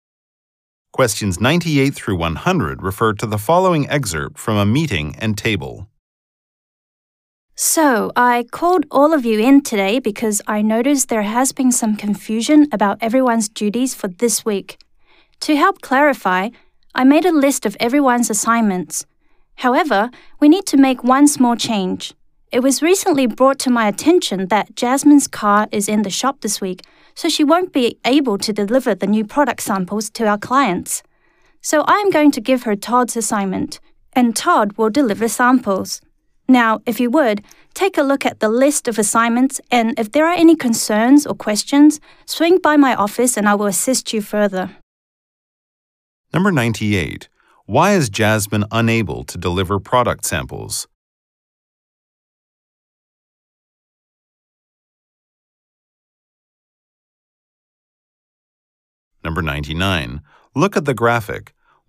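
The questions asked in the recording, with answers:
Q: Why is Jasmine unable to deliver product samples?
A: Her car is in the shop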